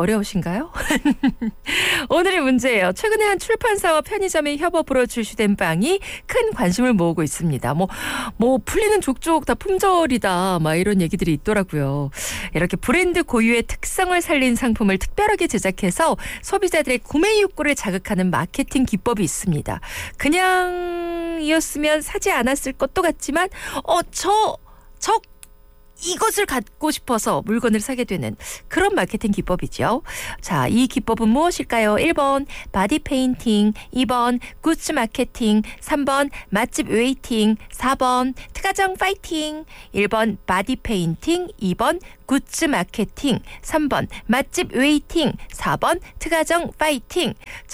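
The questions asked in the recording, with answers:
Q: 자, 이 기법은 무엇일까요?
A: 2: 굿즈 마케팅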